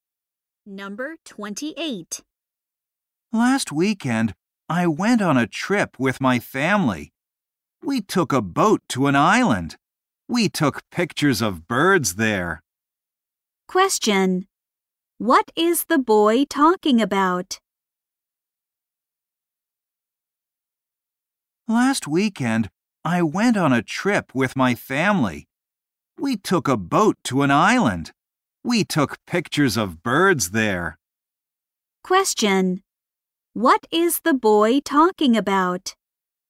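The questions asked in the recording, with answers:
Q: Question. What is the boy talking about?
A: His family trip.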